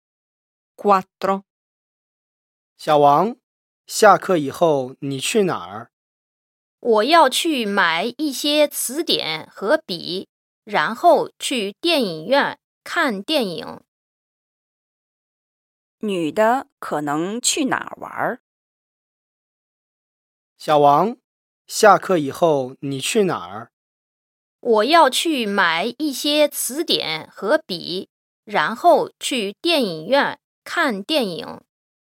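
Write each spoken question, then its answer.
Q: 女的可能去哪儿玩?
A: 电影院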